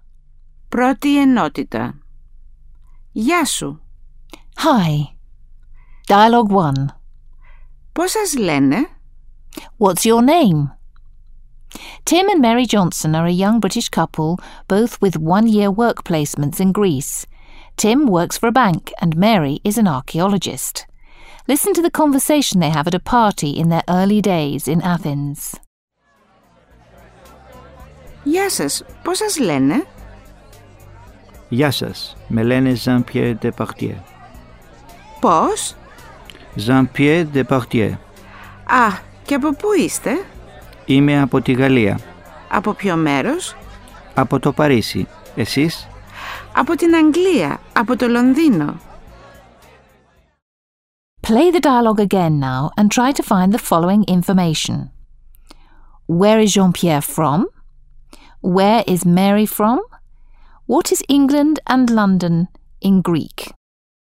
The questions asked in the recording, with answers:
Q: Where is Jean-Pierre from?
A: Jean-Pierre is from Paris

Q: Where is Mary from?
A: Mary from London.

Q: What is England and London in Greek?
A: England is Anglia and London is Londino.